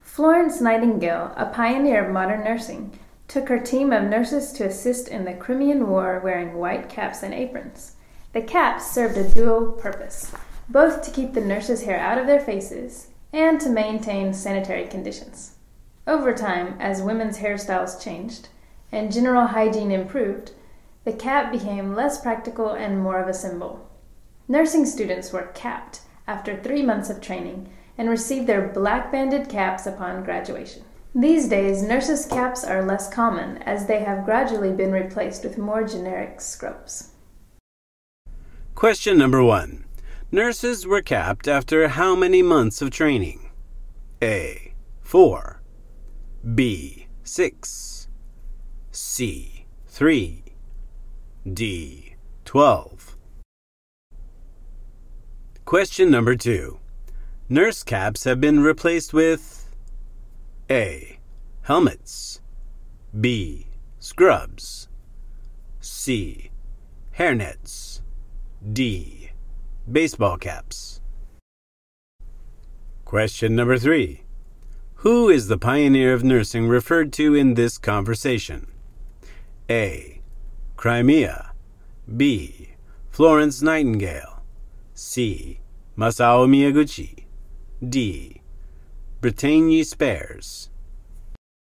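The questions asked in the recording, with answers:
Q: Nurses were capped after how many months of training?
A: C: 3

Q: Nurse caps have been replaced with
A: B: Scrubs

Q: Who is the pioneer of nursing referred to in this conversation?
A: B: Florence Nightingale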